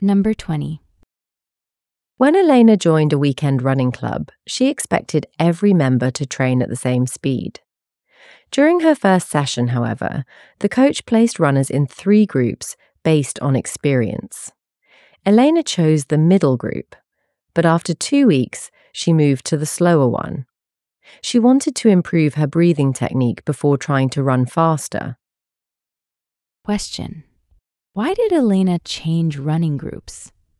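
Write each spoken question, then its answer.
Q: Question: why did Elena change running groups?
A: She wanted to improve her breathing technique before trying to run faster.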